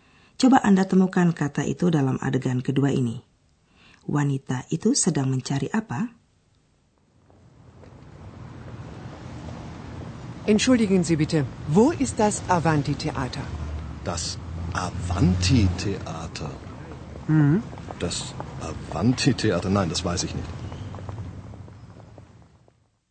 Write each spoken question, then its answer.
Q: Wanita itu sedang mencari apa?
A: Ia mencari gedung sandiwara Avanti.